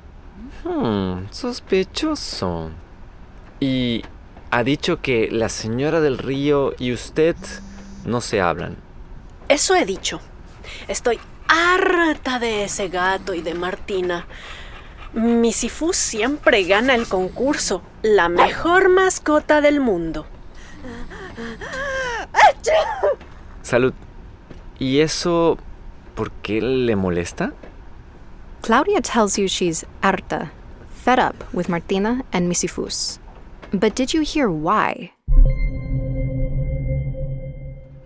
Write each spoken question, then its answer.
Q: But did you hear why?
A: Sí, because mi Sifus siempre gana el concurso.